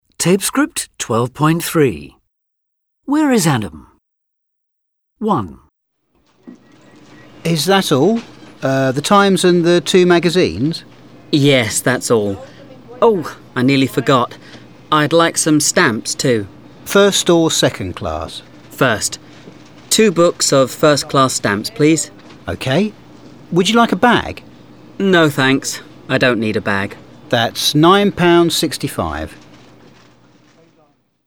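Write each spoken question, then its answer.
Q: Where is Adam?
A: At a newsagent's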